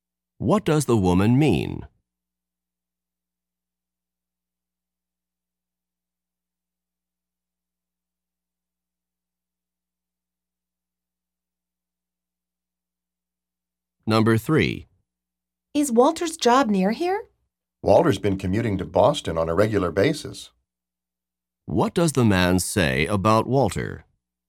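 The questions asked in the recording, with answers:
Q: What does the man say about Walter?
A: Walter regularly commutes to Boston, so his job isn't nearby.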